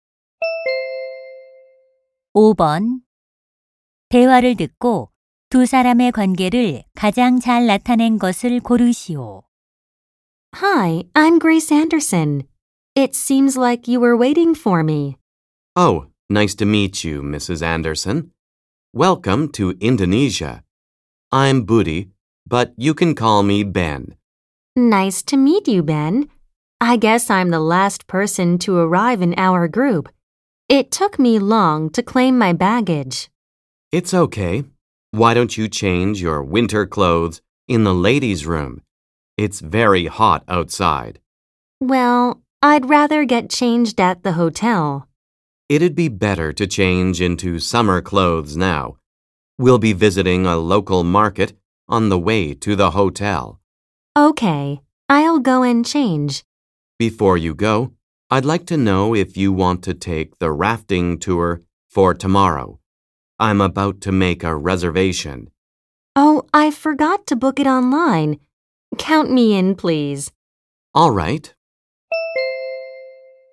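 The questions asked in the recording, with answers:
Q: 대화를 듣고 두 사람의 관계를 가장 잘 나타낸 것을 고르시오.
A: 여행 가이드 - 관광객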